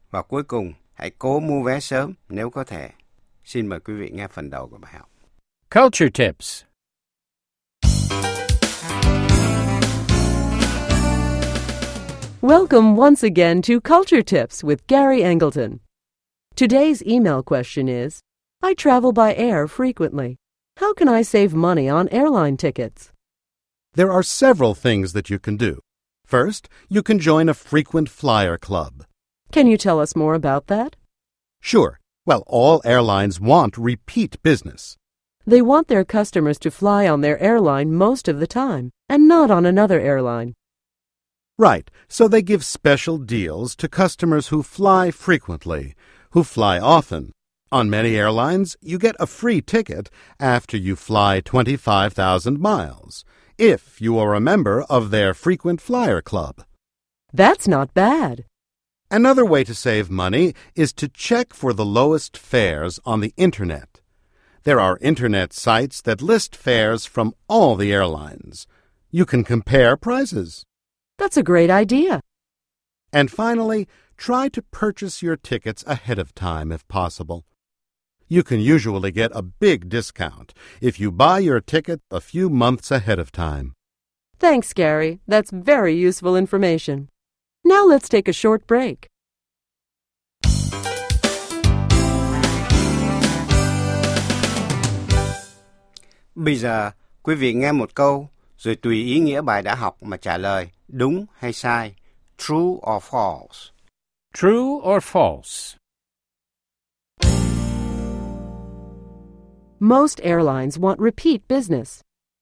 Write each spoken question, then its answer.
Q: Most airlines want repeat business.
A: True. They want their customers to use their airline most of the time.